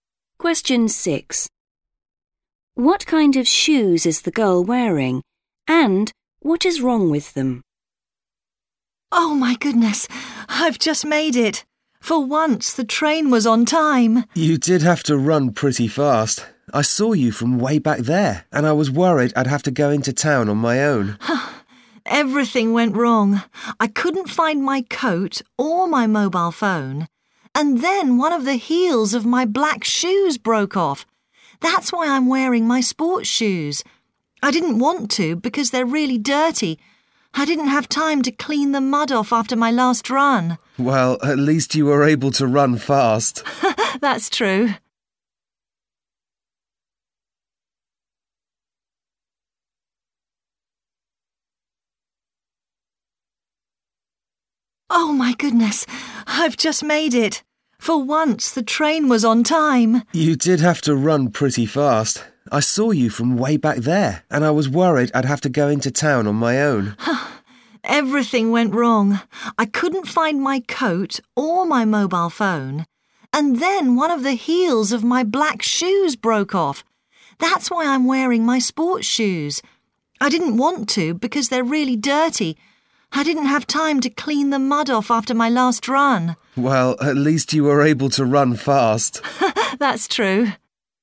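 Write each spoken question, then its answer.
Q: What kind of shoes is the girl wearing?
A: Sports shoes

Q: And what is wrong with them?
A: They are dirty (muddy)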